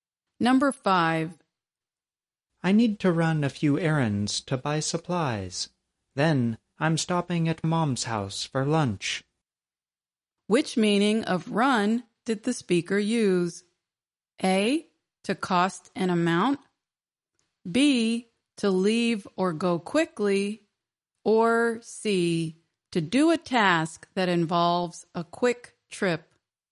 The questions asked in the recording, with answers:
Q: Which meaning of run did the speaker use?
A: The answer is C, to do a task that involves a quick trip.